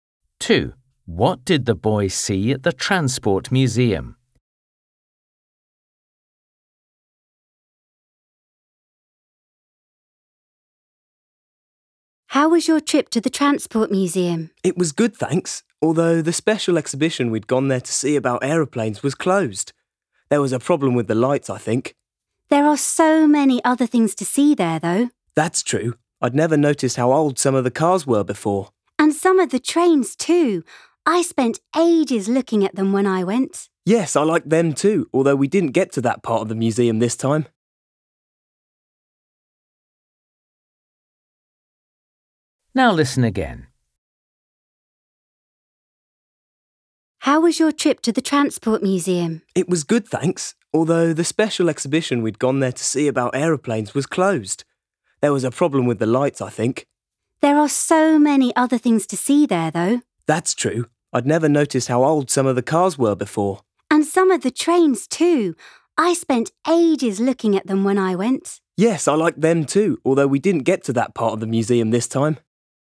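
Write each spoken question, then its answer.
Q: What did the boy see at the Transport Museum?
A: old cars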